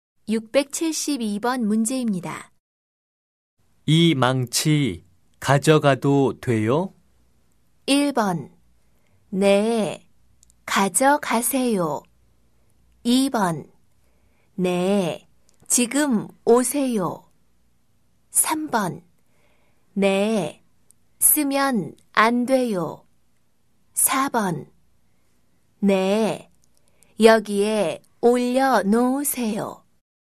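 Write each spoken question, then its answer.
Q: 이 망치 가져가도 돼요?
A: 1: 네, 가져가세요.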